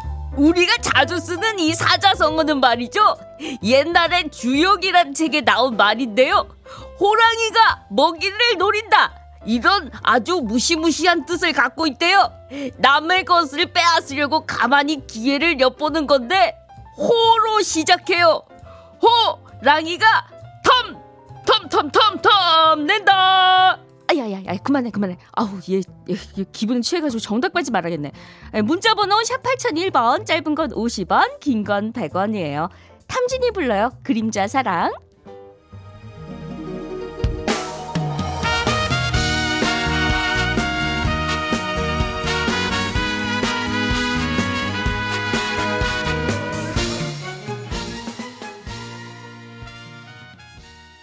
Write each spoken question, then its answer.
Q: 남의 것을 빼앗으려고 가만히 기회를 엿보는 건데 호로 시작해요.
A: 호시탐탐이요